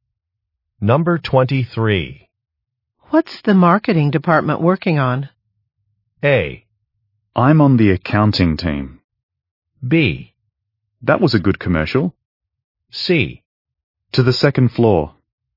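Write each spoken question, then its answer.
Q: What's the marketing department working on?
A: A: I'm on the accounting team.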